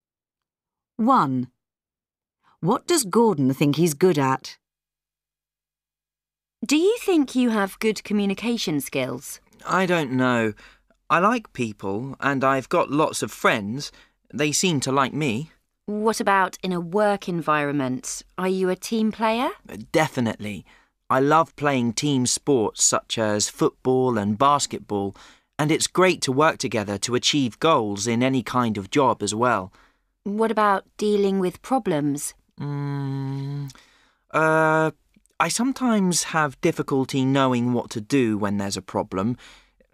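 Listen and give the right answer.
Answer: working in a team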